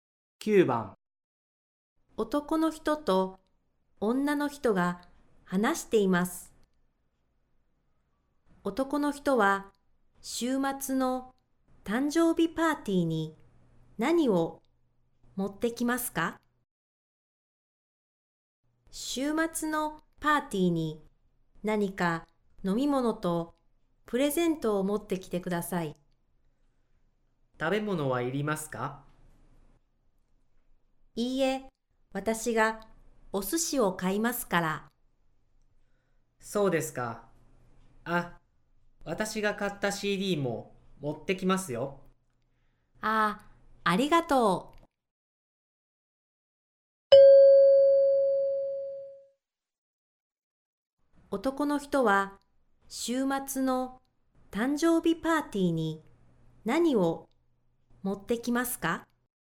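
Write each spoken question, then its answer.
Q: 男の人は週末の誕生日パーティーに何を持ってきますか?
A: 飲み物とプレゼントとCD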